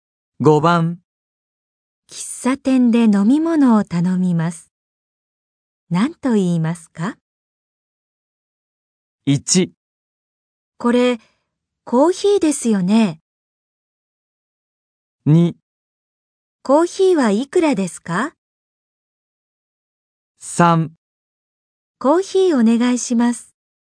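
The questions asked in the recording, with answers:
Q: 喫茶店で飲み物を頼みます。何と言いますか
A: 3: コーヒーお願いします。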